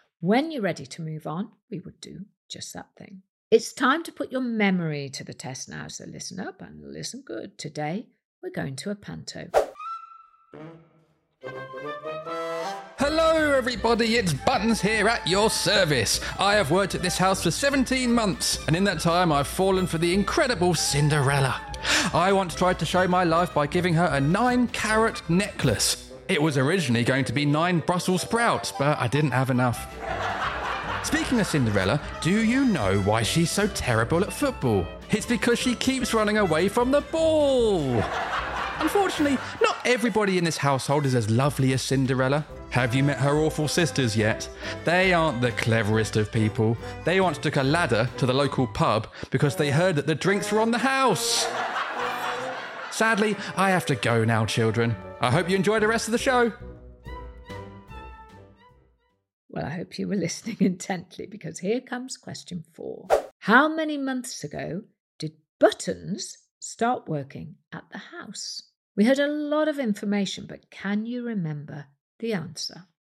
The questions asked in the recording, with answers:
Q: How many months ago did Buttons start working at the house?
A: The answer is 17 months ago.